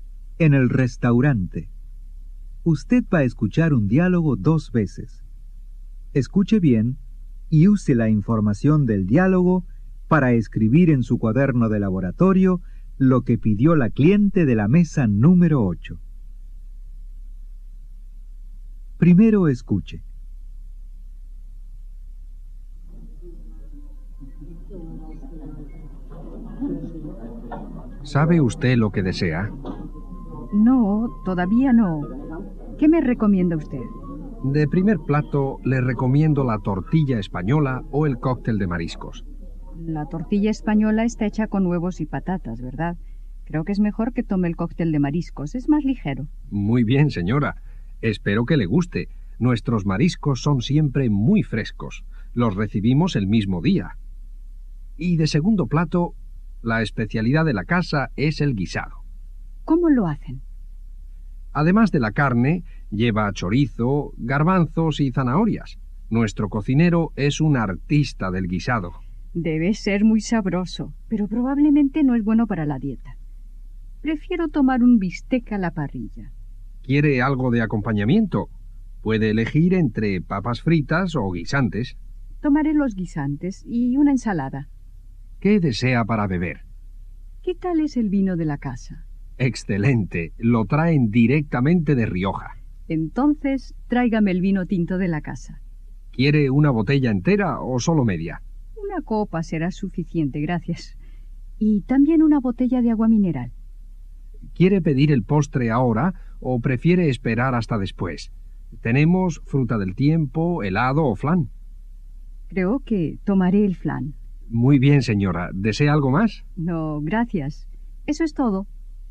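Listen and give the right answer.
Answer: Cóctel de mariscos, bistec a la parrilla con guisantes y ensalada, una copa de vino tinto de la casa, una botella de agua mineral y flan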